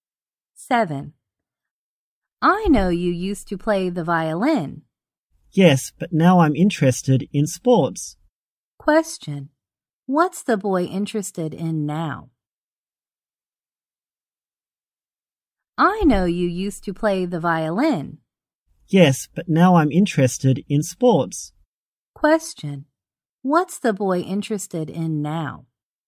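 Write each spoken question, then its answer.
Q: What's the boy interested in now?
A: Sports.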